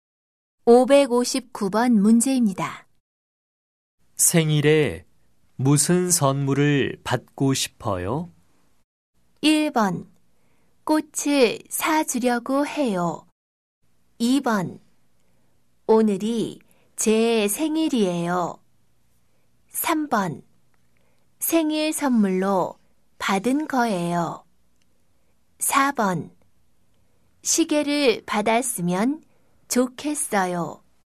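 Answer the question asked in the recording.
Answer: 4: 시계를 받았으면 좋겠어요.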